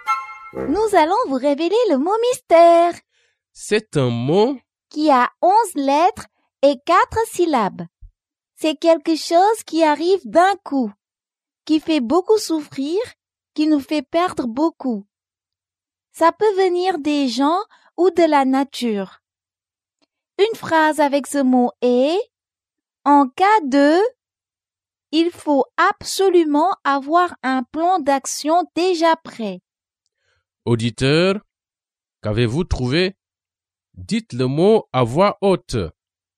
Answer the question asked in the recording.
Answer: Le mot mystère est catastrophe.